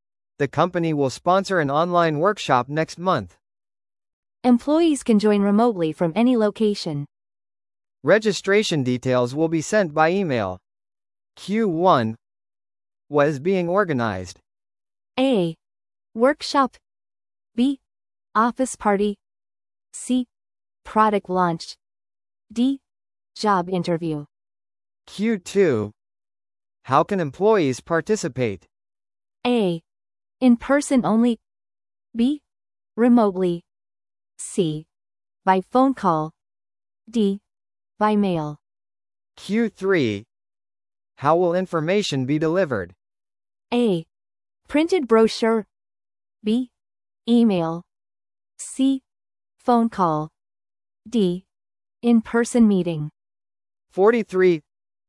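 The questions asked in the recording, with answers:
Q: What is being organized?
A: A: Workshop.

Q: How can employees participate?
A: B: Remotely.

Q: How will information be delivered?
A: B: Email.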